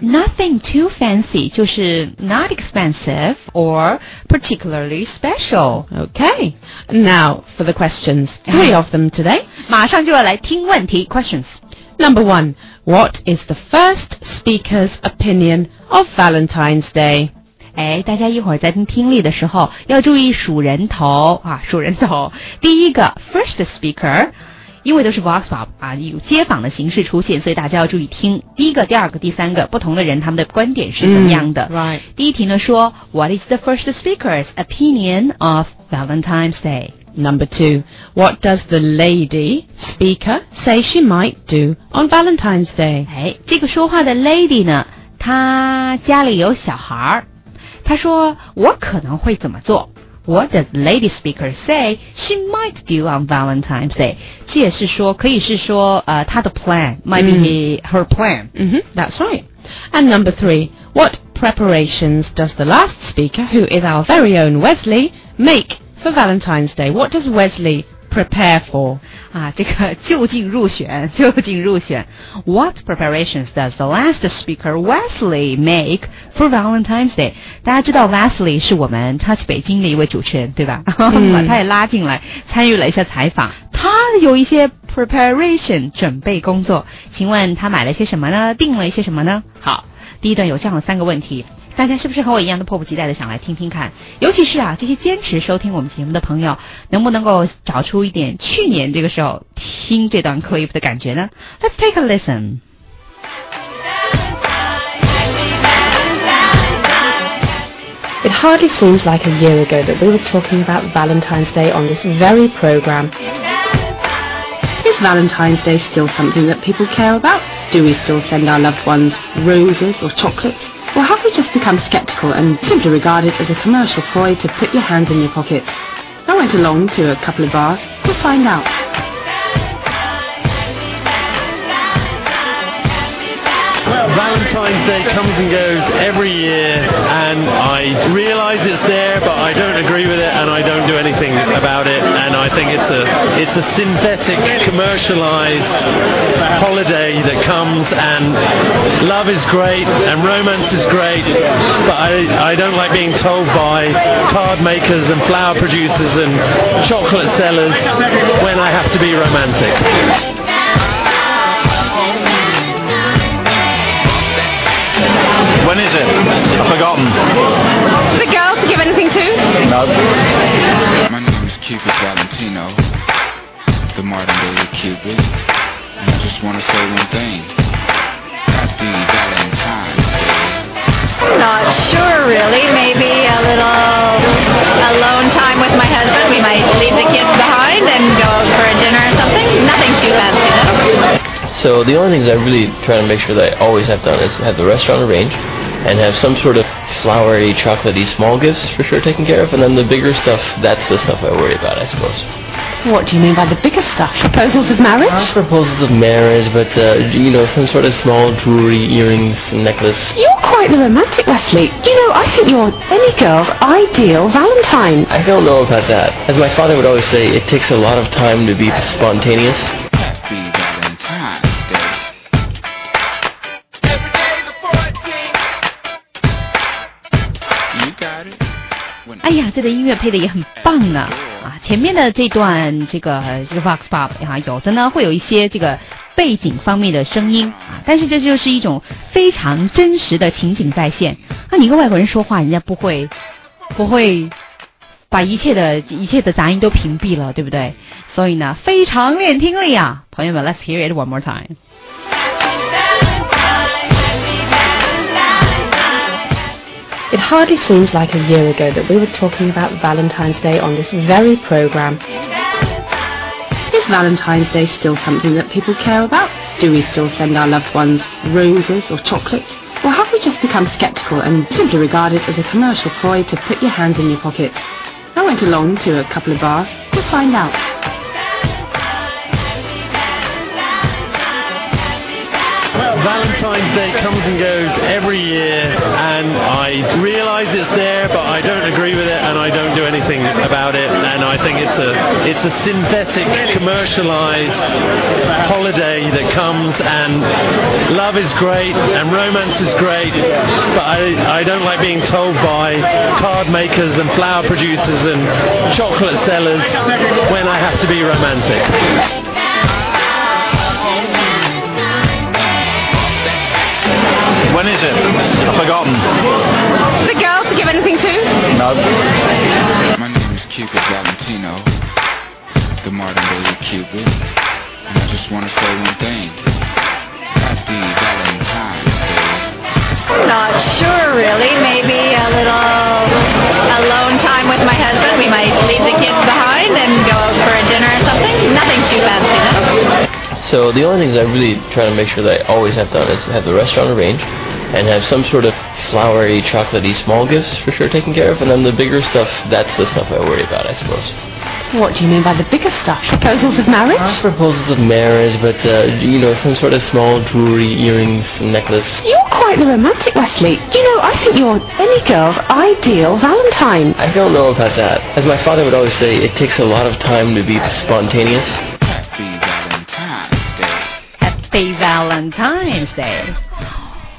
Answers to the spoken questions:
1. He thinks love is great.
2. Leave the kids at home and might go for dinner or something.
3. 安排好了的餐厅 some small gifts and some jewelry.